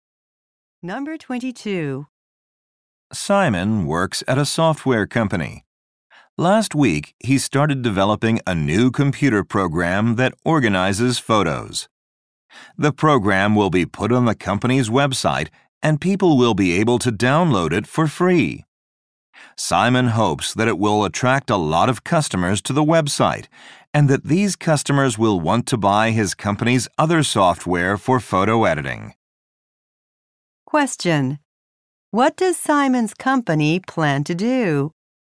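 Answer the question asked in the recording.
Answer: Offer a free photo-organizing program on its website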